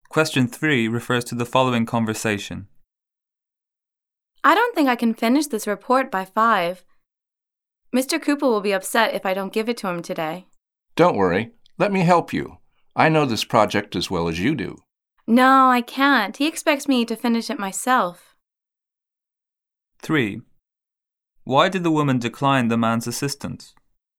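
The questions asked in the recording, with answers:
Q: Why did the woman decline the man's assistance?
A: Mr. Cooper expects her to finish the report herself.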